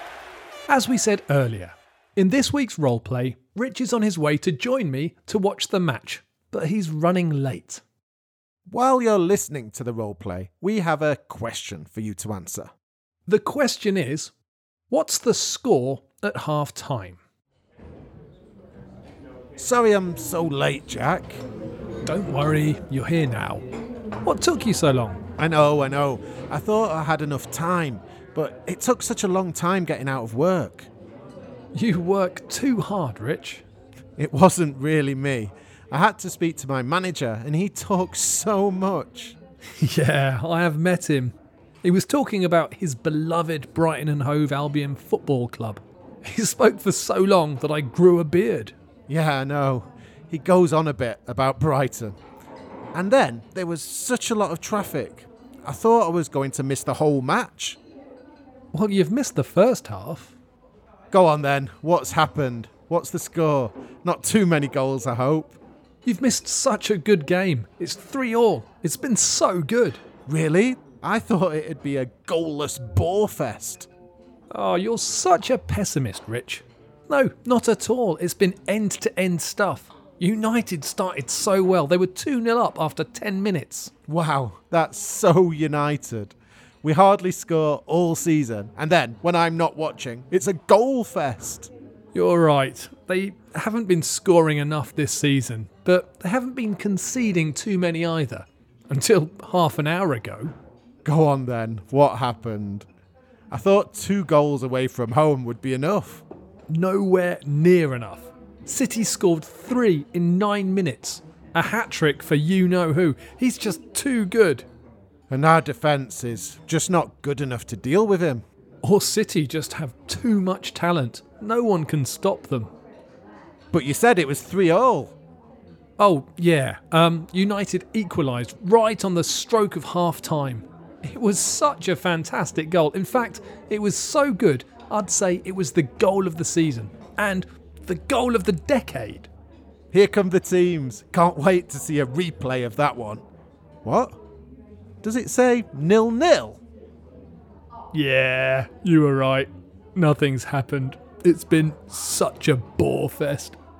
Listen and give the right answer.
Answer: Well, the score was actually 0-0.